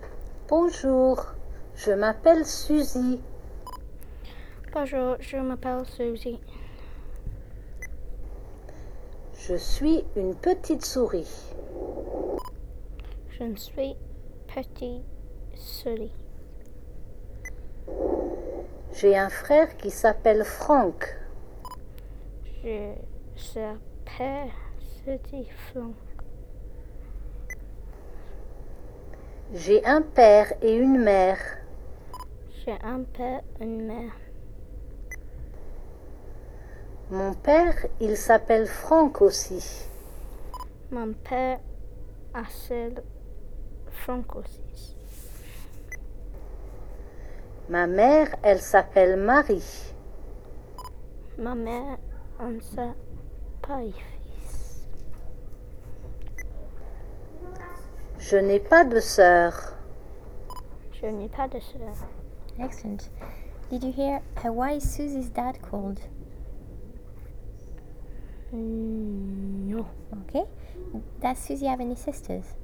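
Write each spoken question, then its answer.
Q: Did you hear why is Susie's dad called?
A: Franck

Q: Does Susie have any sisters?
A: No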